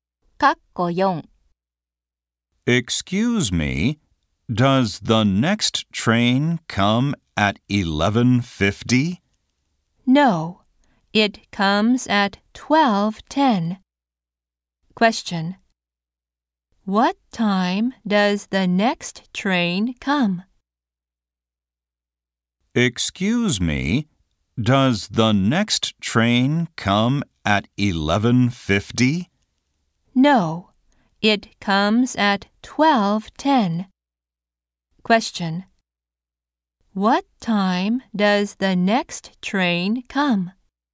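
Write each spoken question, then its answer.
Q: What time does the next train come?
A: 12:10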